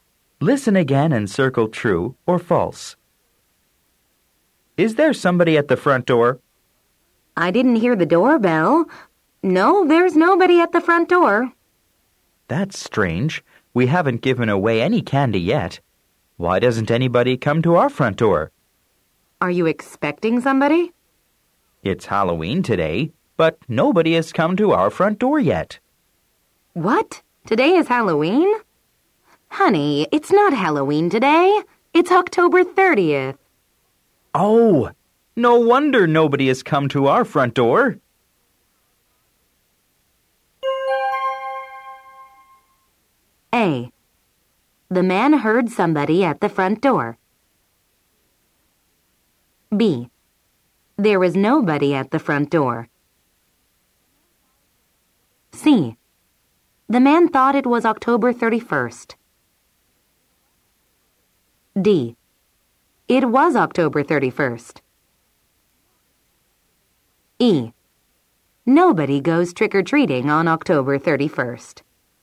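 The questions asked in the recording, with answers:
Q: The man heard somebody at the front door.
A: False

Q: There was nobody at the front door.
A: True

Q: The man thought it was October 31st.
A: True

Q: It was October 31st.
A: False

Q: Nobody goes trick-or-treating on October 31st.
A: False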